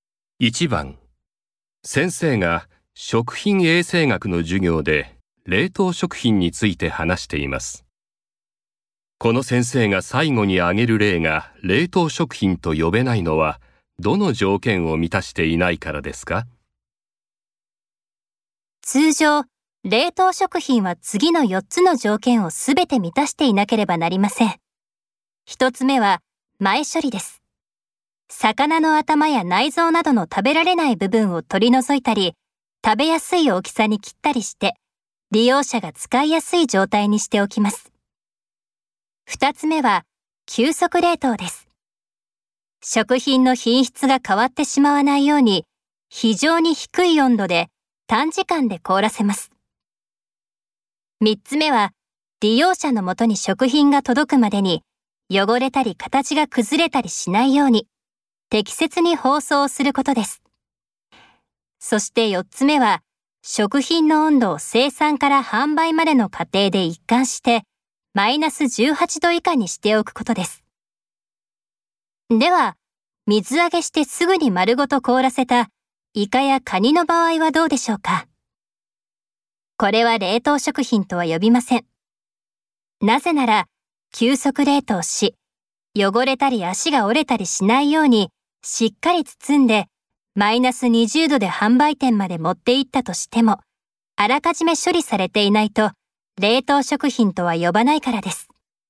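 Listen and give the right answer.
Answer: 前処理(1つ目の条件)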